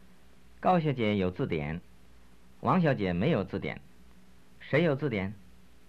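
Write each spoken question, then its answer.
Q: 谁有字典?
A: 高小姐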